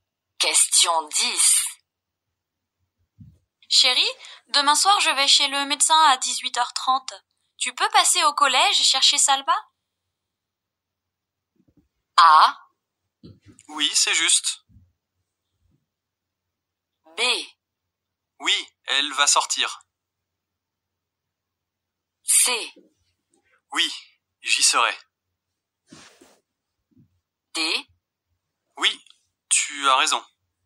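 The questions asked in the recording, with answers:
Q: Tu peux passer au collège et chercher Salma?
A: C: Oui, j'y serai.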